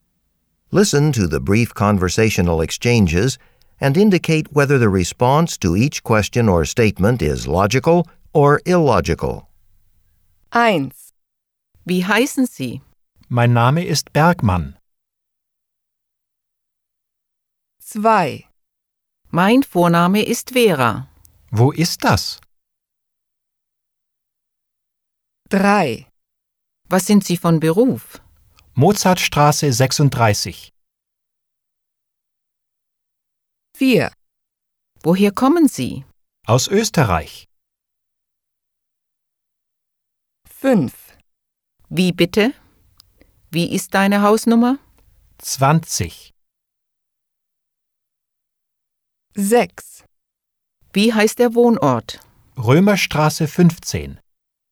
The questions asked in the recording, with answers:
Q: Wie heißen Sie? Mein Name ist Bergmann.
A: 1. Logisch.

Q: Mein Vorname ist Vera. Wo ist das?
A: 2. Unlogisch.

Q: Was sind Sie von Beruf? Mozartstraße 36.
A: 3. Unlogisch.

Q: Woher kommen Sie? Aus Österreich.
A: 4. Logisch.

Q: Wie bitte? Wie ist deine Hausnummer? 20.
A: 5. Logisch.

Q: Wie heißt der Wohnort? Römerstraße 15.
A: 6. Unlogisch.